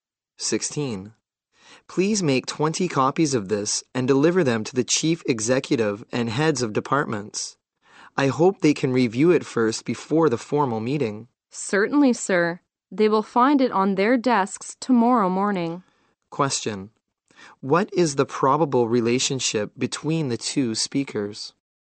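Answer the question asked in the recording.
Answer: Boss and secretary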